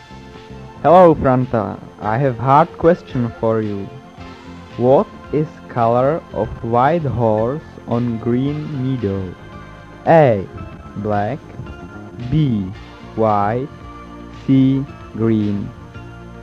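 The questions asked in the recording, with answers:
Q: What is color of white horse on green meadow?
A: B: White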